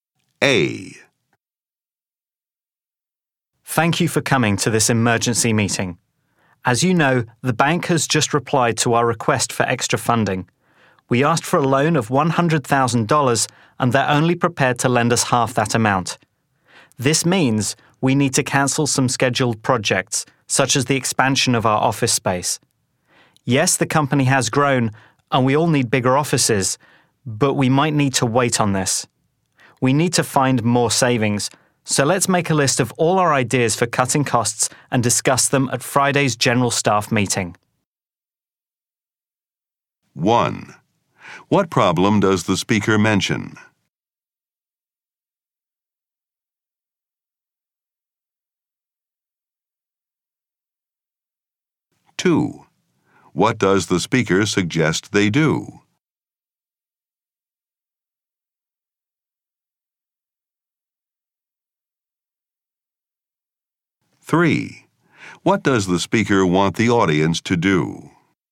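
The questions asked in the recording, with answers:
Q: What problem does the speaker mention?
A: The bank will lend only half the requested $100,000 loan

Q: What does the speaker suggest they do?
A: Cancel some projects, such as the office expansion, and find more savings

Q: What does the speaker want the audience to do?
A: Make a list of ideas for cutting costs to discuss at Friday's staff meeting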